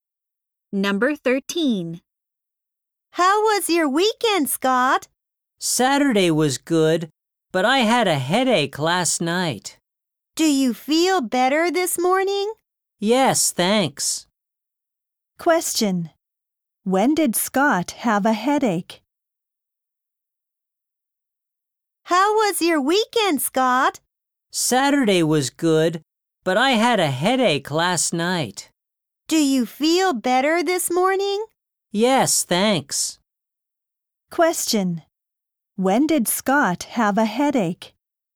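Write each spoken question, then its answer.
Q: When did Scott have a headache?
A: Last night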